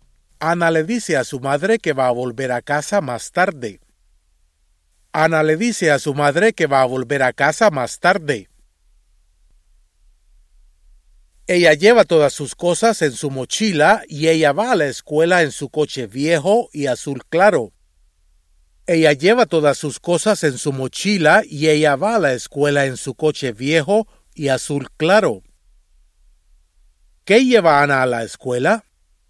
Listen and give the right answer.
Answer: Ana lleva todas sus cosas en su mochila.